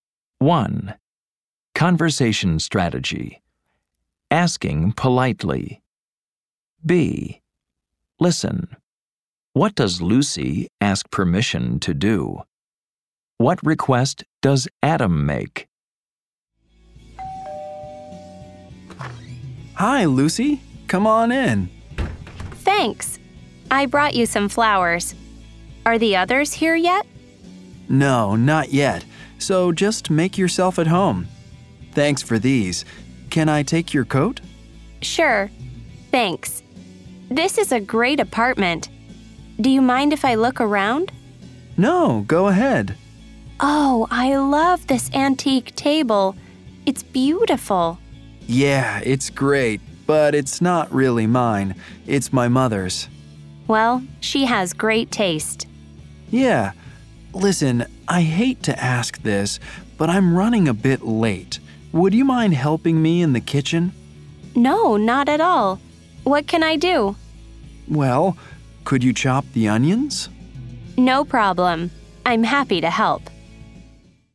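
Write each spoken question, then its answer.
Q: What does Lucy ask permission to do?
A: To look around Adam's apartment

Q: What request does Adam make?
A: He asks her to help him in the kitchen by chopping the onions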